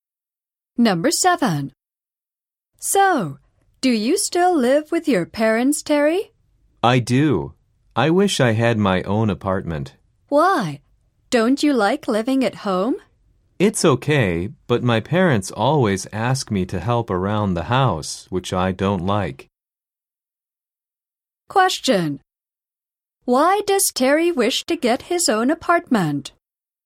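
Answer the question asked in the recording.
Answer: Because his parents always ask him to help around the house, which he doesn't like.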